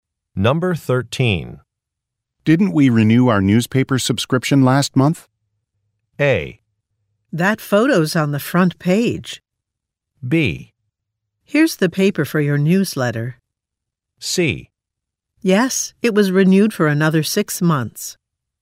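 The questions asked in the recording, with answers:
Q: Didn't we renew our newspaper subscription last month?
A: C: Yes, it was renewed for another 6 months.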